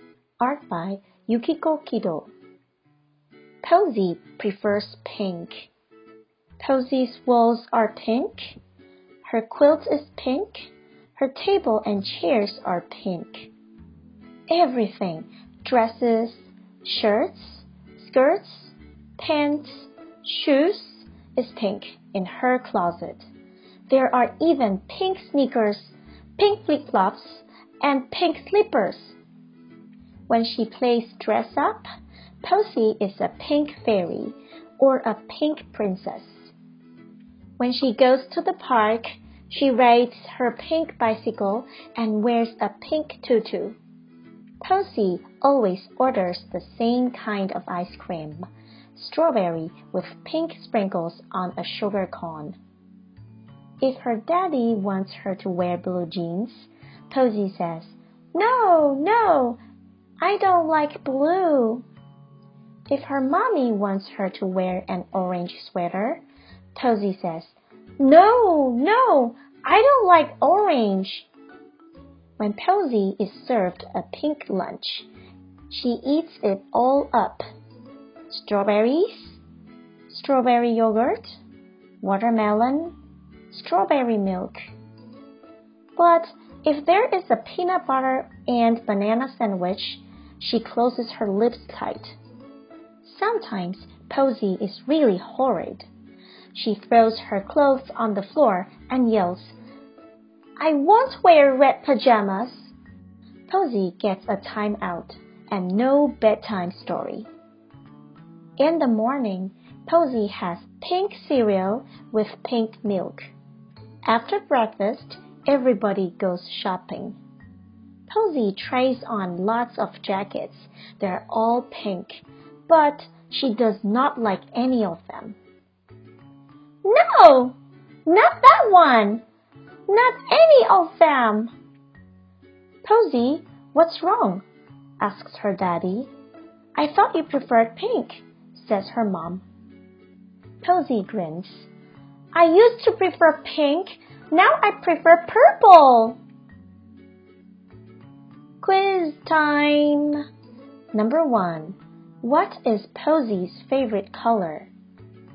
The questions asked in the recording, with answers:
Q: What is Posey's favorite color?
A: The answer is pink.